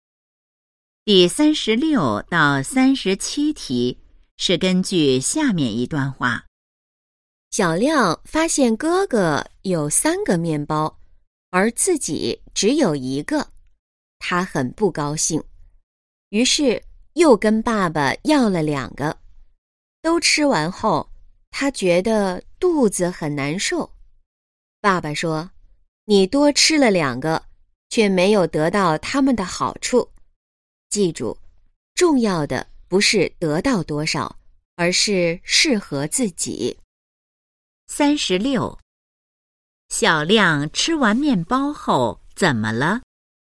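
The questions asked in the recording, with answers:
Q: 小亮吃完面包后怎么了?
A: 肚子很难受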